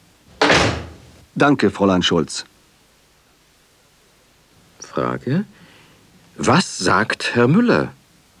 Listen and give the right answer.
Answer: Er sagt: Danke, Fräulein Schulz.